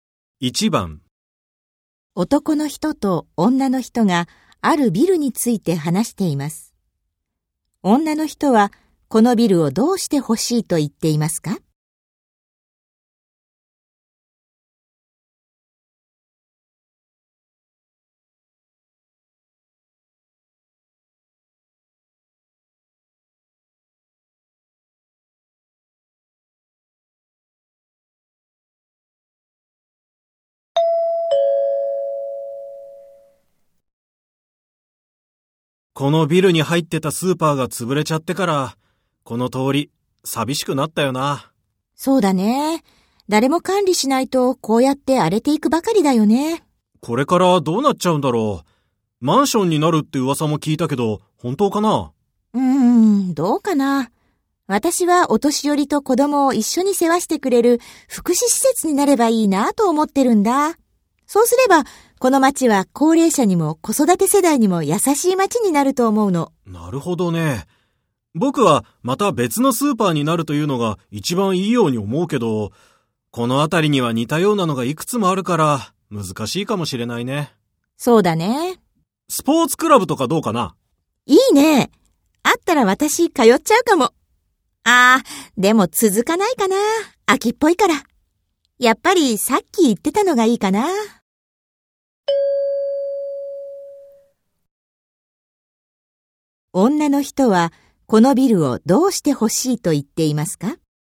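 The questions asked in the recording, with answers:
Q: 女の人はこのビルをどうして欲しいと言っていますか?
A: お年寄りと子供を一緒に世話してくれる福祉施設になってほしい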